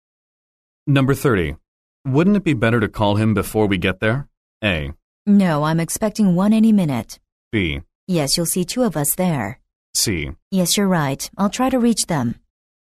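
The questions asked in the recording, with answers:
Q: Wouldn't it be better to call him before we get there?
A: C: Yes, you're right. I'll try to reach them.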